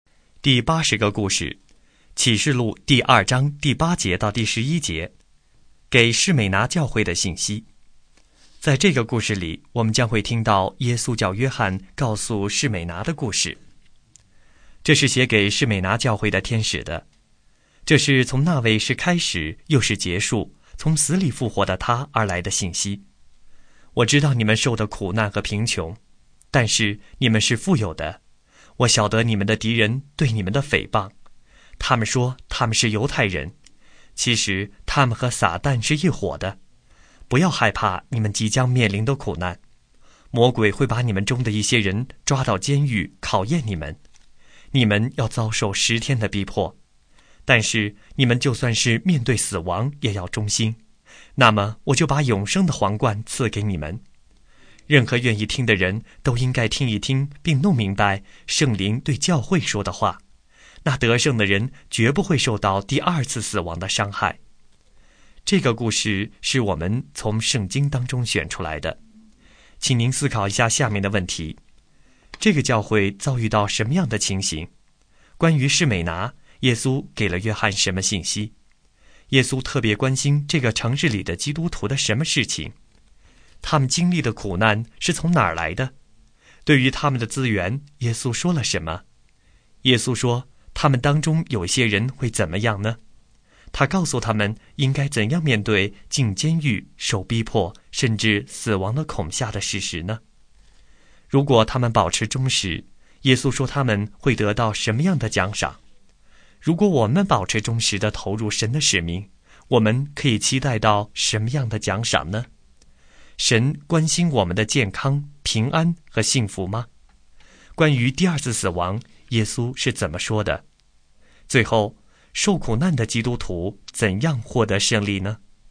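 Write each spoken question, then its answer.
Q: 对于他们的资源,耶稣说了什么?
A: 他们虽然贫穷,但其实是富有的

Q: 耶稣说,他们当中有些人会怎么样呢?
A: 会被魔鬼抓到监狱里受考验,遭受十天的逼迫

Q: 如果他们保持忠实,耶稣说他们会得到什么样的奖赏?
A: 永生的皇冠

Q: 关于第二次死亡,耶稣是怎么说的?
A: 得胜的人绝不会受到第二次死亡的伤害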